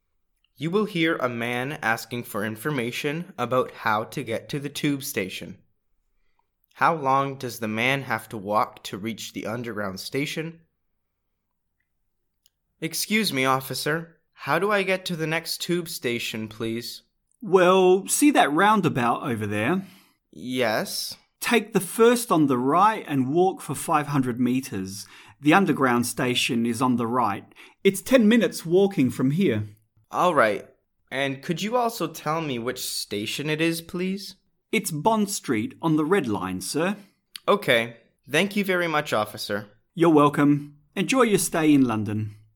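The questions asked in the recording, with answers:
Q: How long does the man have to walk to reach the underground station?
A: 10 minutes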